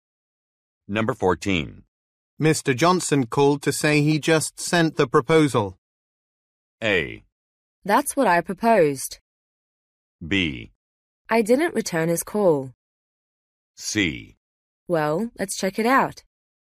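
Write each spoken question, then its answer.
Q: Mr. Johnson called to say he just sent the proposal.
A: C: Well, let's check it out.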